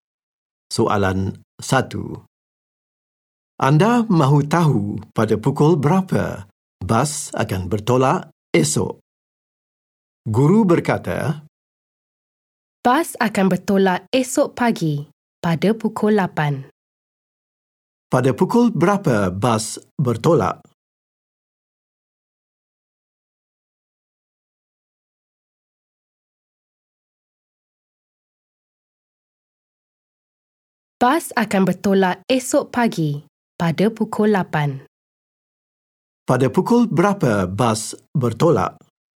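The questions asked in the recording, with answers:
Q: Pada pukul berapa bas bertolak?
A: Pukul 8 pagi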